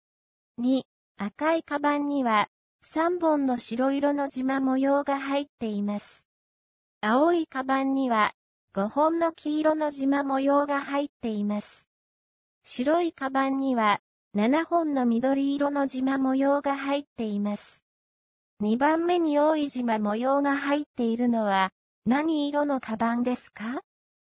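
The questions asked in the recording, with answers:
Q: 2番目に多い縞模様が入っているのは何色のカバンですか?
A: 青いカバン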